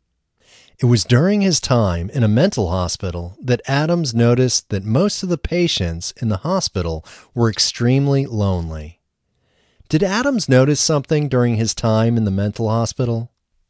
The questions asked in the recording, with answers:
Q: Did Adams notice something during his time in the mental hospital?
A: Yes, Adams noticed something during his time in the mental hospital.